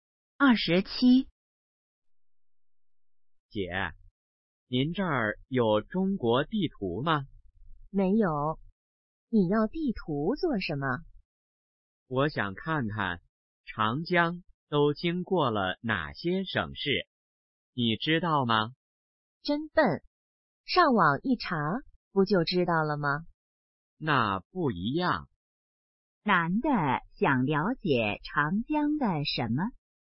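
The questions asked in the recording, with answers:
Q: 男的想了解长江的什么?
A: 经过了哪些省市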